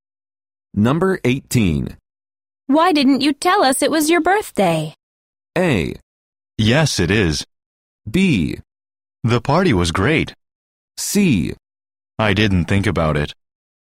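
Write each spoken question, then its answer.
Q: Why didn't you tell us it was your birthday?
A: C: I didn't think about it.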